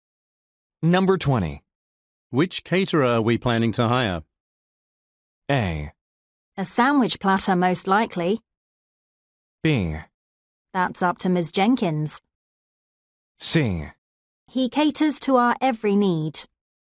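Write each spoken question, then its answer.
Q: Which caterer are we planning to hire?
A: B: That's up to Ms. Jenkins.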